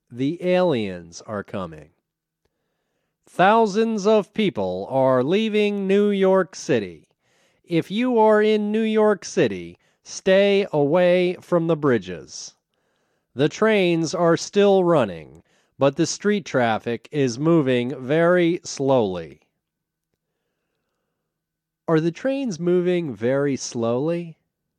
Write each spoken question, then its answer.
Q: Are the trains moving very slowly?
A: No, the trains aren't moving very slowly.